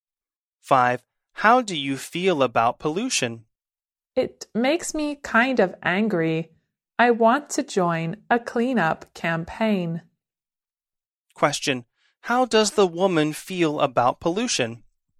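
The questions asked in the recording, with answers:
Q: How does the woman feel about pollution?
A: Angry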